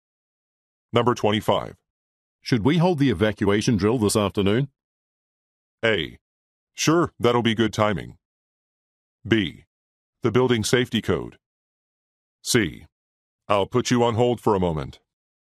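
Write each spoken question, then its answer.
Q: Should we hold the evacuation drill this afternoon?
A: A: Sure, that'll be good timing.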